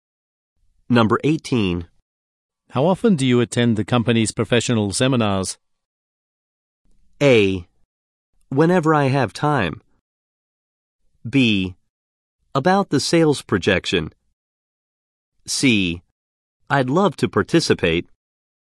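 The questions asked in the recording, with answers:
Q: How often do you attend the company's professional seminars?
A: A: Whenever I have time.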